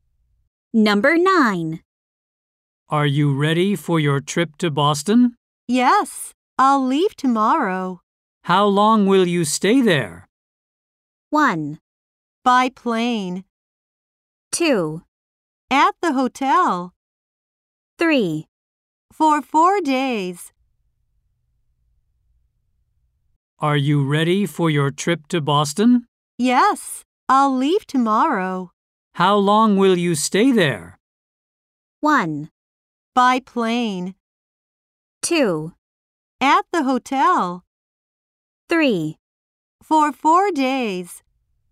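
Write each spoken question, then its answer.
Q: How long will you stay there?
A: 3: For 4 days.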